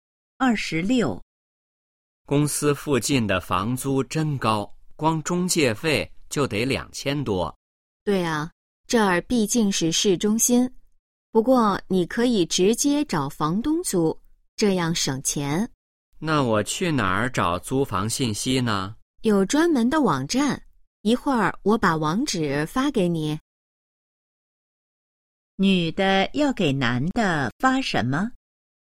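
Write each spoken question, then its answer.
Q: 女的要给男的发什么?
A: 租房网站的网址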